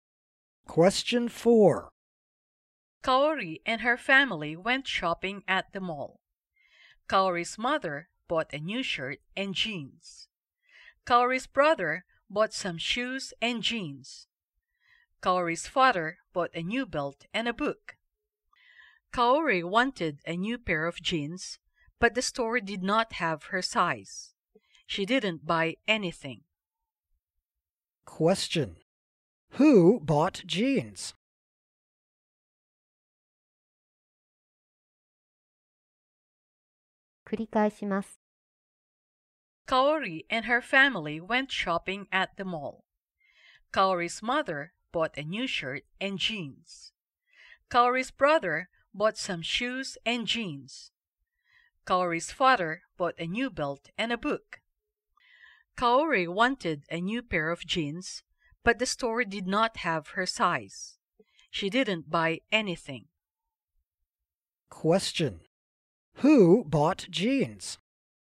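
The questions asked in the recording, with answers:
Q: Who bought jeans?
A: Kaori's mother and brother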